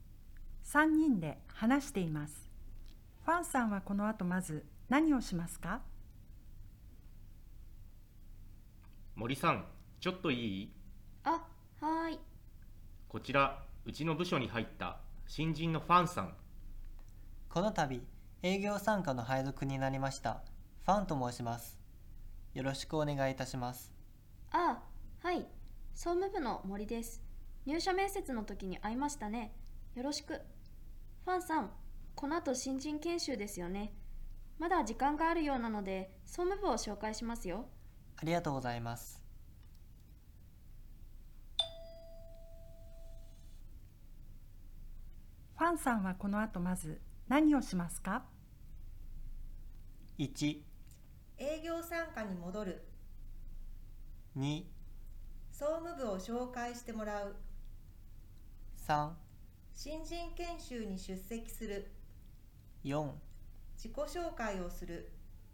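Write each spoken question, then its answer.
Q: ファンさんはこの後まず何をしますか?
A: 2: 総務部を紹介してもらう。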